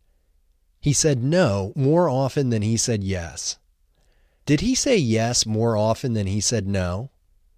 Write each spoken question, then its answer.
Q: Did he say yes more often than he said no?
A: No, he didn't say yes more often than he said no.